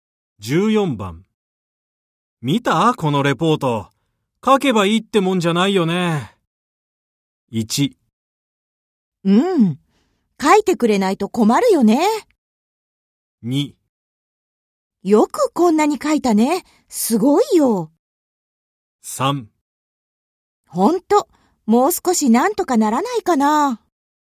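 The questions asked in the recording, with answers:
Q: 見た?このレポート。書けばいいってもんじゃないよね。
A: 3: ほんと、もう少しなんとかならないかな。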